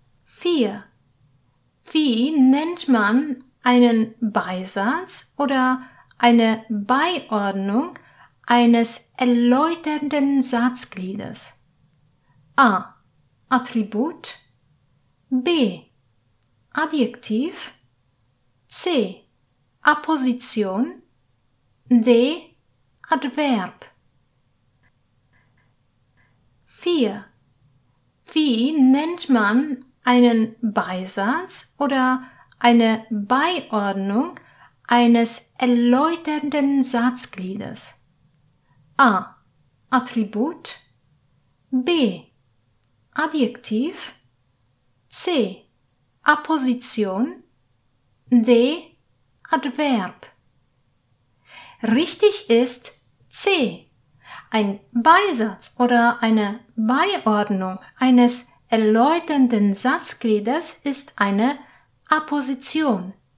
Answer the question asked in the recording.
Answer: Richtig ist C